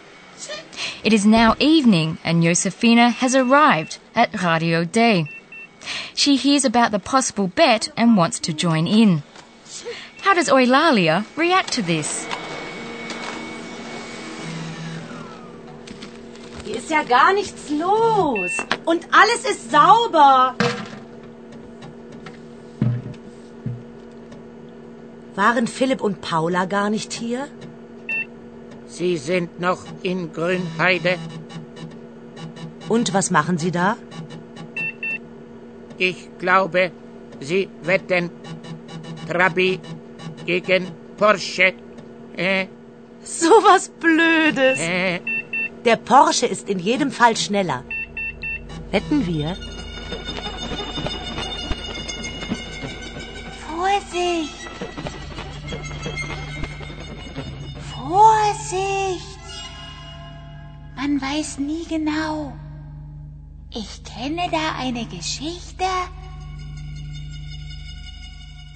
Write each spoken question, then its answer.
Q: How does Eulalia react to this?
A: Eulalia warns her to be careful because you never really know for sure.